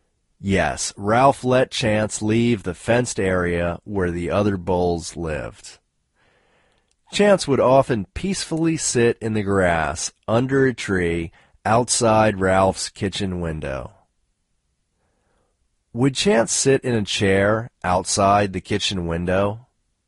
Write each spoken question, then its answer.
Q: Would Chance sit in a chair outside the kitchen window?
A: No, Chance wouldn't sit in a chair outside the kitchen window.